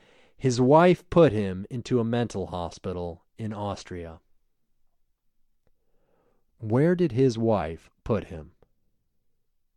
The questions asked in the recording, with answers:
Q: Where did his wife put him?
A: His wife put him in a mental hospital in Austria.